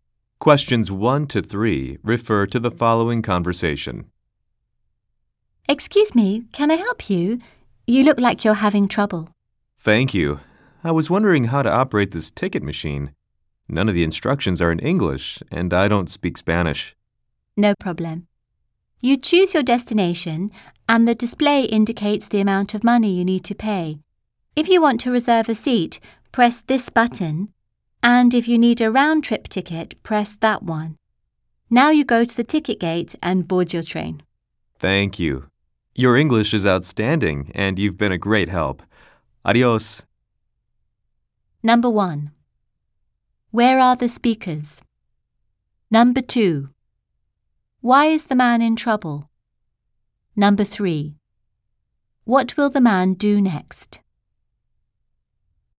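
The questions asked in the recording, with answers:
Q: Where are the speakers?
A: At a train station, at a ticket machine

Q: Why is the man in trouble?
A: He can't read the ticket machine's instructions because they aren't in English

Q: What will the man do next?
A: Go to the ticket gate and board his train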